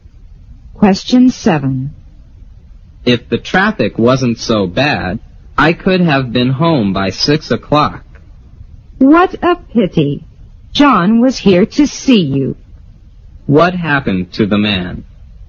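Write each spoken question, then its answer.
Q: What happened to the man?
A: He was held up by heavy traffic and got home late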